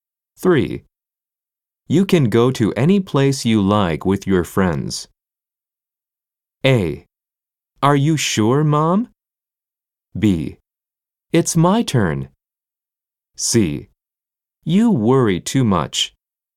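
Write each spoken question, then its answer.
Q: You can go to any place you like with your friends.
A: A: Are you sure, Mom?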